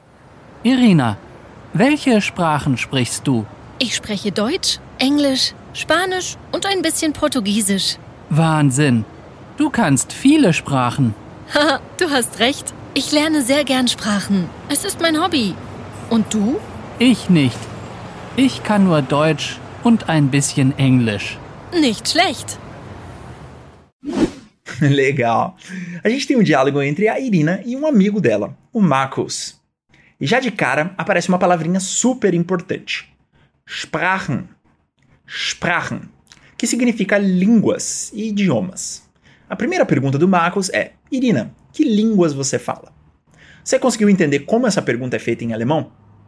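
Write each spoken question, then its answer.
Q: E você conseguiu sacar quais línguas a Irina sabe?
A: Alemão, inglês, espanhol e um pouco de português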